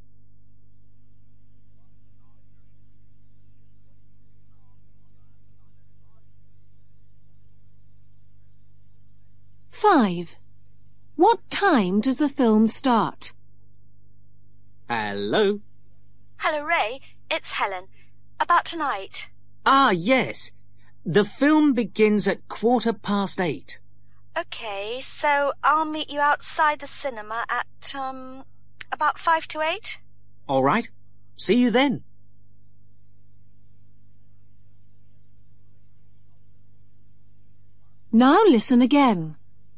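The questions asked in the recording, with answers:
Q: What time does the film start?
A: 8:15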